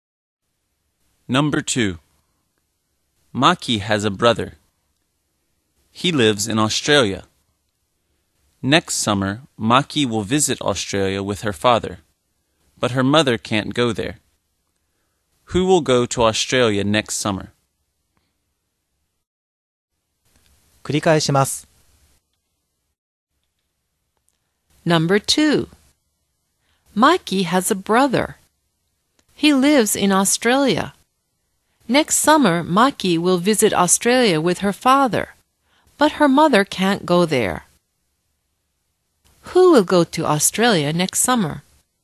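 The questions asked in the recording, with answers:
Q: Who will go to Australia next summer?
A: Maki and her father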